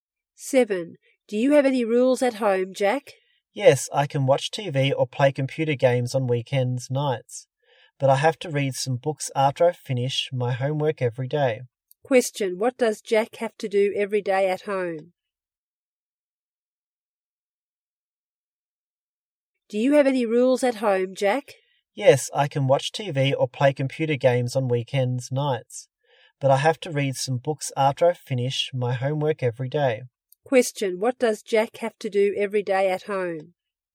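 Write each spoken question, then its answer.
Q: what does Jack have to do every day at home?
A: Read some books after he finishes his homework.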